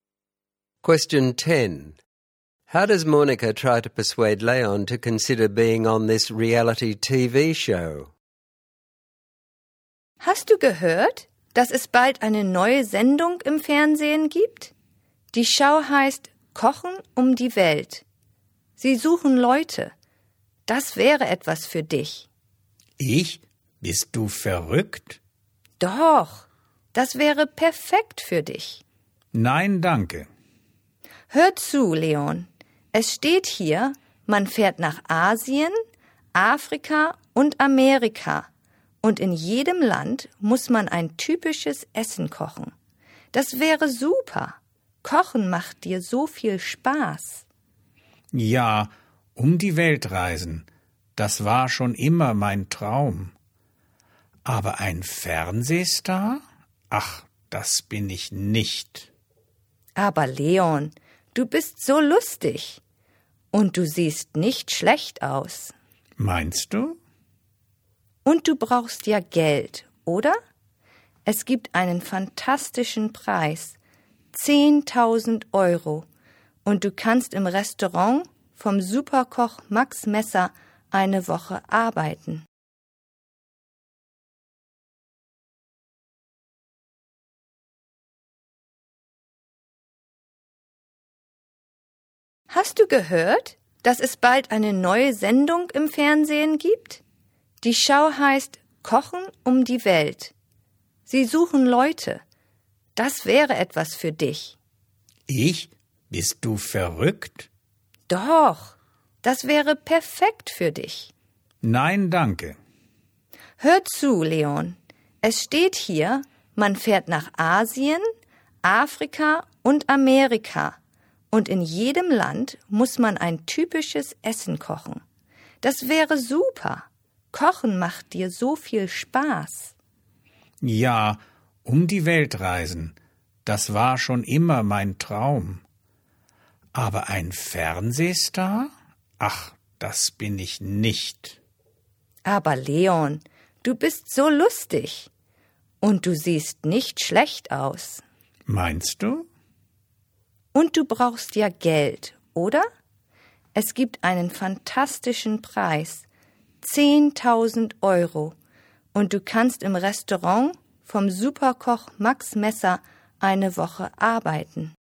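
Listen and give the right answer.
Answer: Says he loves cooking, he'd travel the world, he's funny and good-looking, he needs money; prize of 10,000 euros and a week working in Max Messer's restaurant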